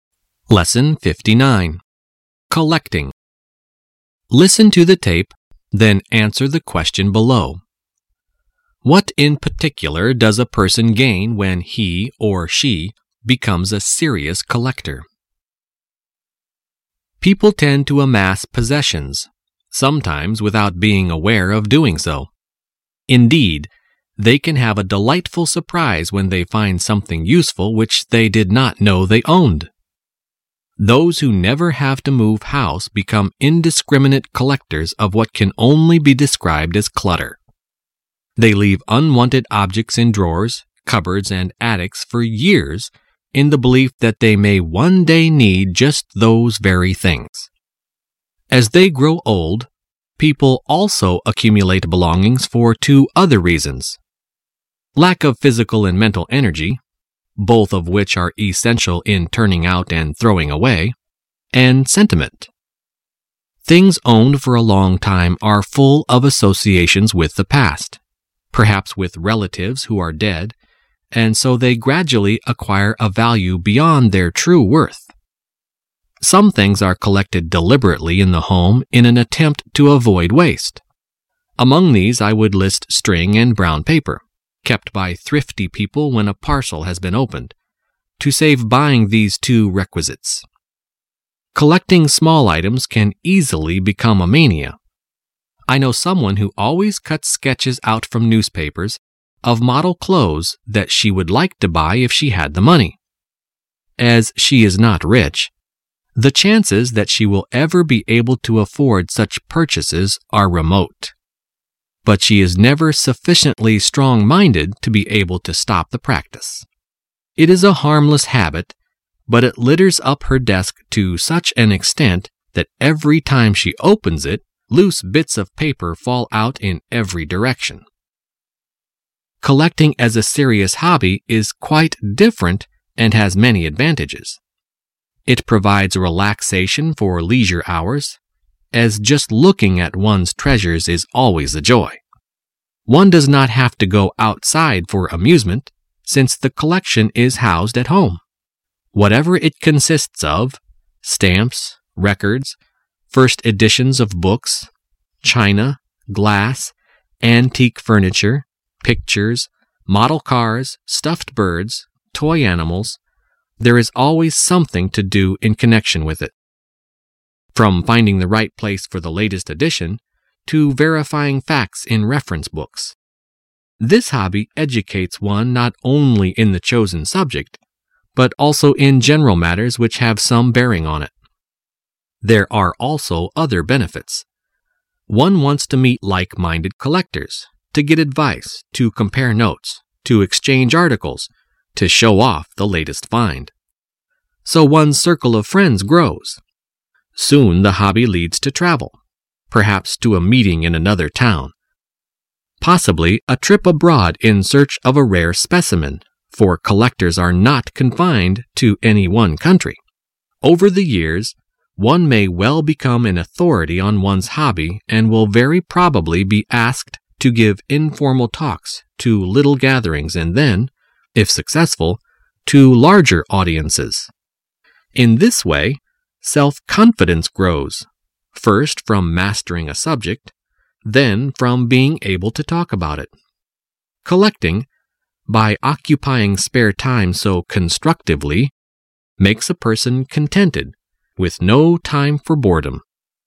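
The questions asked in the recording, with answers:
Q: What in particular does a person gain when he or she becomes a serious collector?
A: Self-confidence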